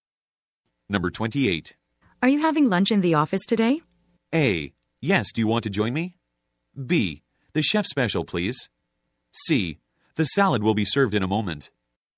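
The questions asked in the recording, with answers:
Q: Are you having lunch in the office today?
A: A: Yes, do you want to join me?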